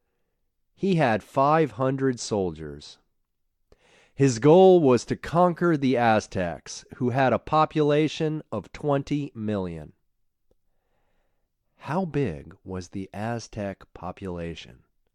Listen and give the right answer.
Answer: The Aztec population was 20 million.